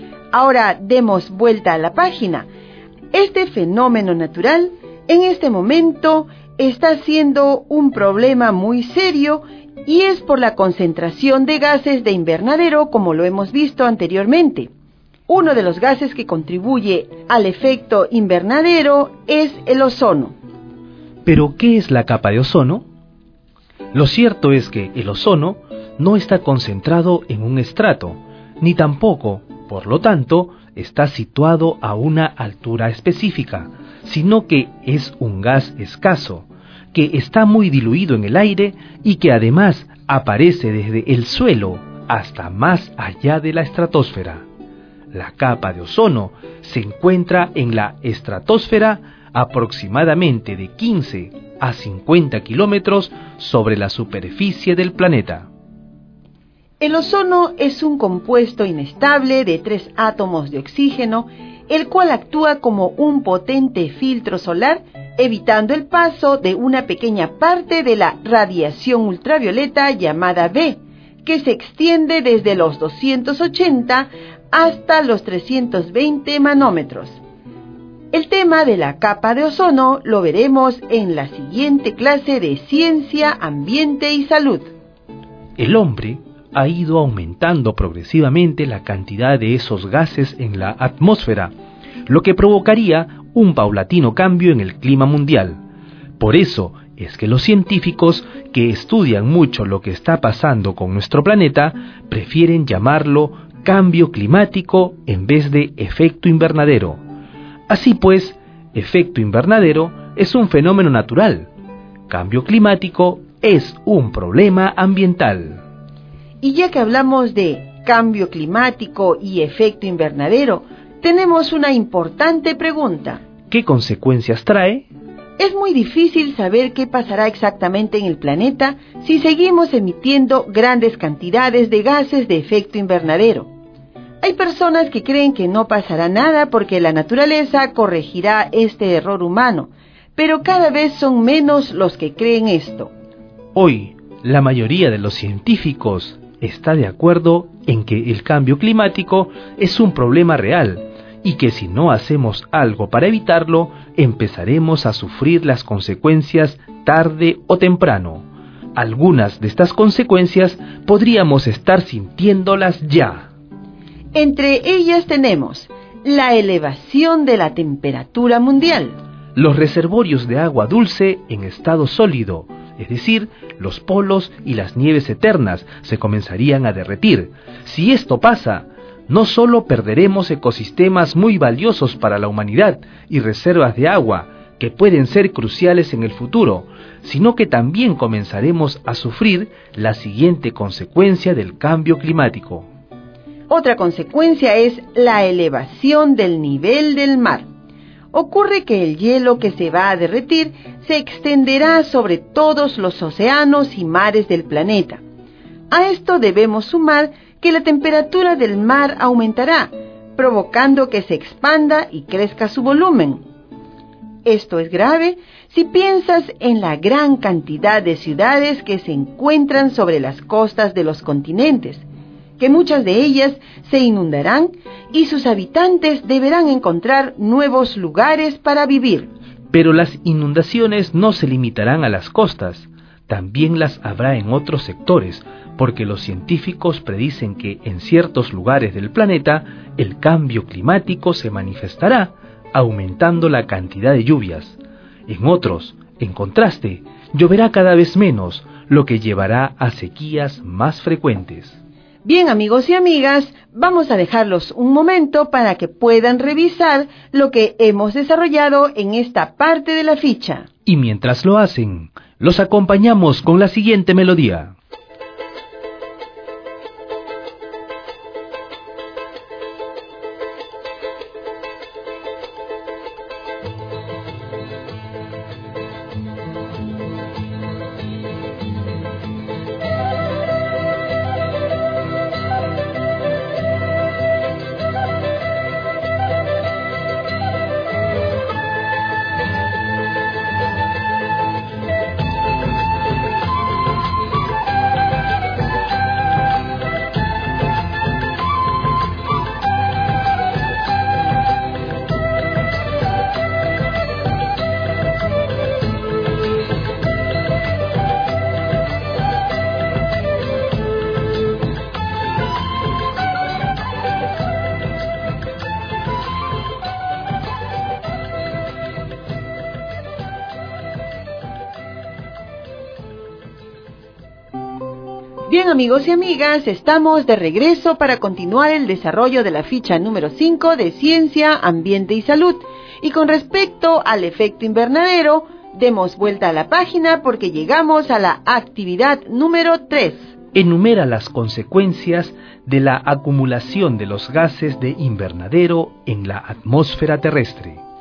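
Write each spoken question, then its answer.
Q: Enumera las consecuencias de la acumulación de los gases de invernadero en la atmósfera terrestre.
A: Sube la temperatura mundial, se derriten los polos y las nieves eternas, sube el nivel del mar, hay inundaciones, más lluvias en unos lugares y sequías en otros.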